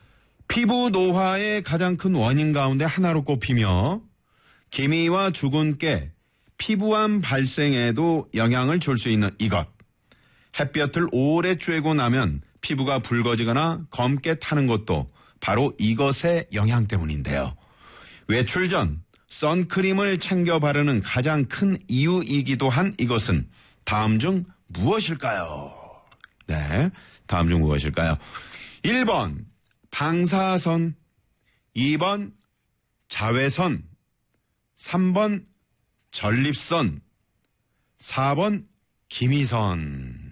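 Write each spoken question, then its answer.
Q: 외출 전 선크림을 챙겨 바르는 가장 큰 이유이기도 한 이것은 다음 중 무엇일까요?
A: 2: 자외선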